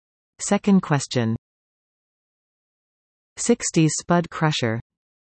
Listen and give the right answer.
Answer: The answer? The mashed potato.